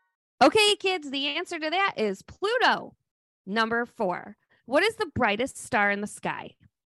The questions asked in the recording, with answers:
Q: What is the brightest star in the sky?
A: It's the Sirius star because it is seriously bright.